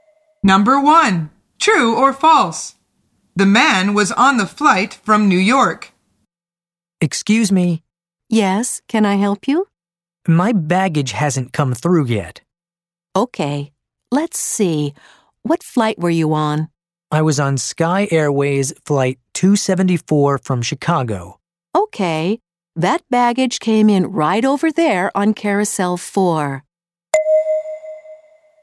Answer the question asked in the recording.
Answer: The answer is false.